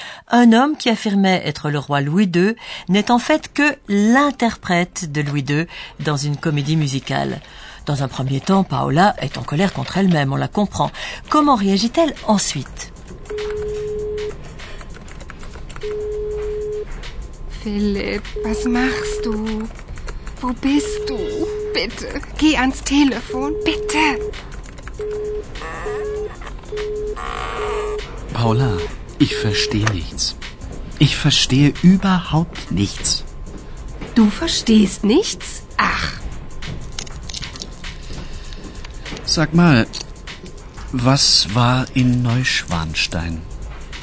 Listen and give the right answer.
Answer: La première réaction de Paola est d'essayer d'appeler Philippe.